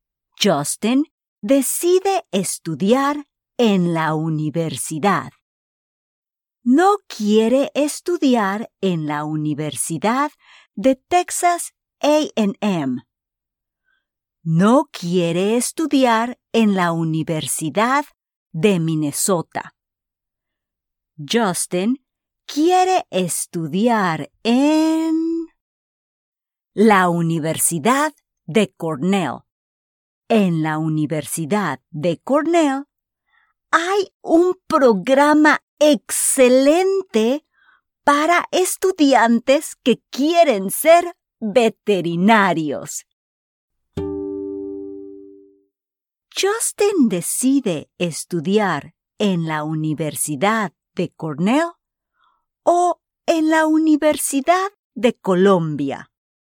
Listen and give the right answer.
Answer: Correcto. Justin decide estudiar en la Universidad de Cornell.